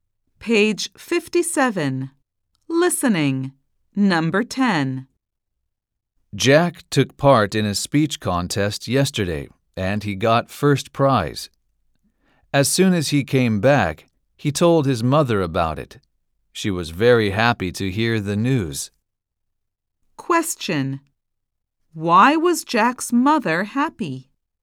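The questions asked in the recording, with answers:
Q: Why was Jack's mother happy?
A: Because Jack won first prize in the speech contest.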